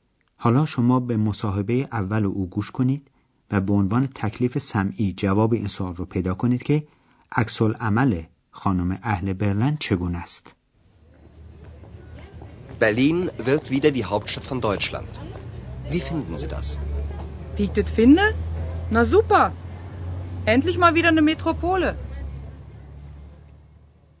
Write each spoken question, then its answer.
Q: عکس عمل خانم اهل برلن چگونه است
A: پس خانم با لحجه قلیز برلنی از این موضوع ابراز خوشبختی میکنه و به نظر او این امر عالی است که برلن دوباره به صورت شهر اصلی و مهم کشور در میاد.